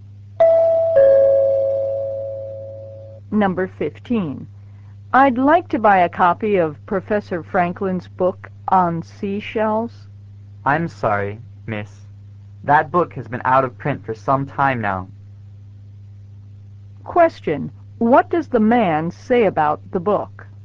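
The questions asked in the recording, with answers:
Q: What does the man say about the book?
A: It has been out of print for some time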